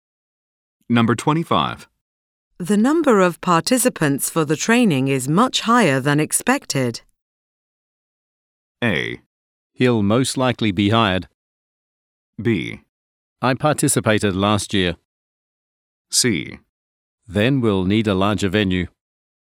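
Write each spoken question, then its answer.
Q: The number of participants for the training is much higher than expected.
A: C: Then we'll need a larger venue.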